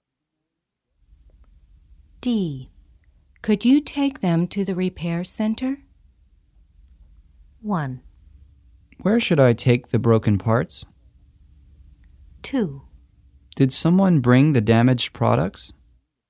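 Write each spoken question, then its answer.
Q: Could you take them to the repair center?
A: 1: Where should I take the broken parts?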